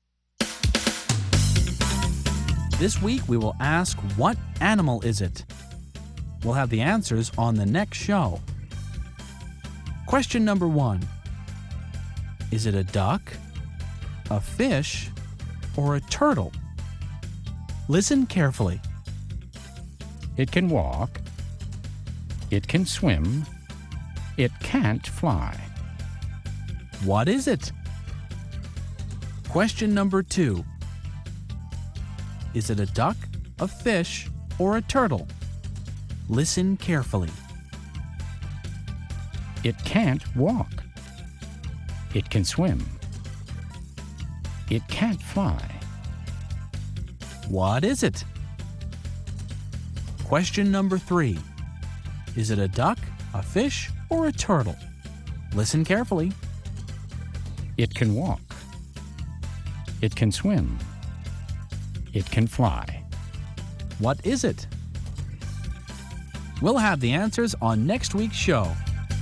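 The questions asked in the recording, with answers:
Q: Is it a duck, a fish, or a turtle? Listen carefully. It can walk. It can swim. It can't fly. What is it?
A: a turtle

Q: Is it a duck, a fish, or a turtle? Listen carefully. It can't walk. It can swim. It can't fly. What is it?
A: a fish

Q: Is it a duck, a fish, or a turtle? Listen carefully. It can walk. It can swim. It can fly. What is it?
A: a duck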